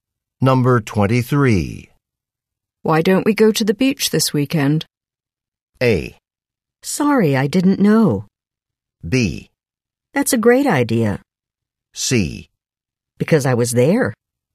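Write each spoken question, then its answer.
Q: Why don't we go to the beach this weekend?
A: B: That's a great idea.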